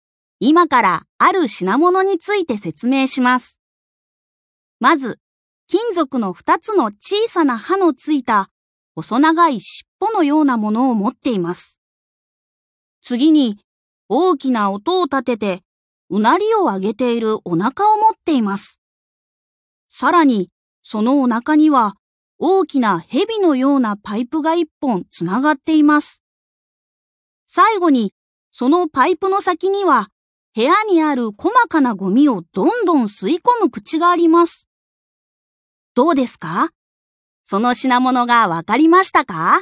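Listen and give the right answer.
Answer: 掃除機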